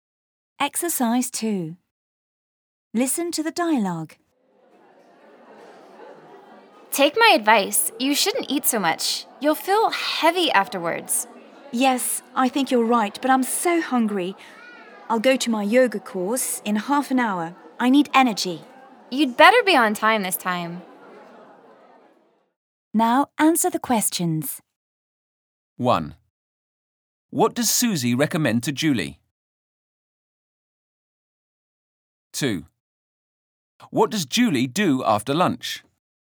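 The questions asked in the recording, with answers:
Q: What does Susie recommend to Julie?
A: She shouldn't eat so much.

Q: What does Julie do after lunch?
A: She goes to her yoga course.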